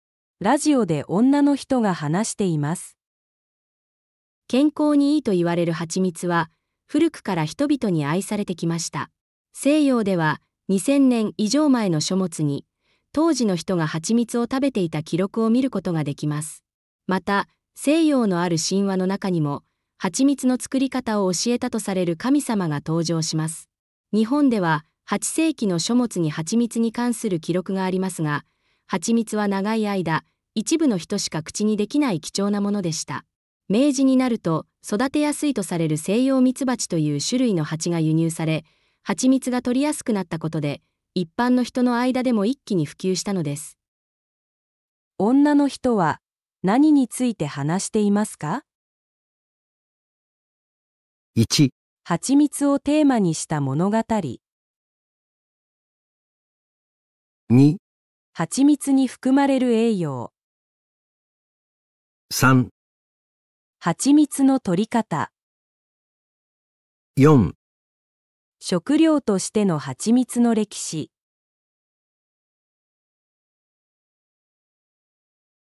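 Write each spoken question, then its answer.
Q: 女の人は何について話していますか?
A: 4: 食料としての蜂蜜の歴史。

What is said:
ラジオで女の人が話しています。
女:健康にいいと言われるハチミツは古くから人々に愛されてきました。
西洋では2000年以上前の書物に当時の人がハチミツを食べていた記録を見ることができます。また、西洋のある神話の中にもハチミツの作り方を教えたとされる神様が登場します。
日本では8世紀の書物にハチミツに関する記録がありますが、ハチミツは長い間一部の人しか口にできない貴重なものでした。明治になると育てやすいとされる西洋ミツバチという種類の蜂が輸入され、ハチミツが採りやすくなったことで一般の人の間でも一気に普及したのです。
1.ハチミツをテーマにした物語
2.ハチミツに含まれる栄養
4.食料としてのハチミツの歴史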